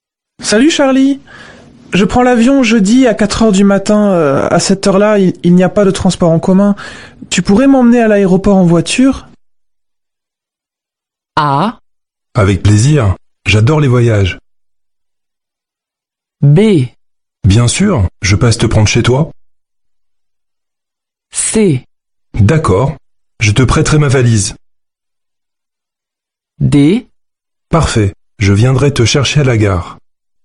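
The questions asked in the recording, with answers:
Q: Tu pourrais m'emmener à l'aéroport en voiture?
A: B: Bien sûr, je passe te prendre chez toi.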